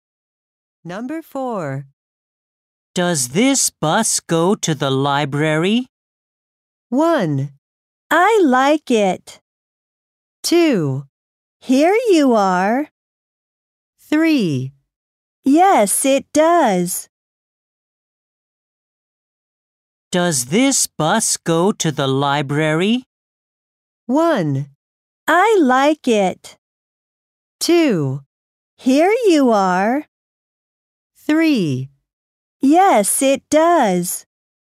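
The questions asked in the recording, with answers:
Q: Does this bus go to the library?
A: 3: Yes, it does.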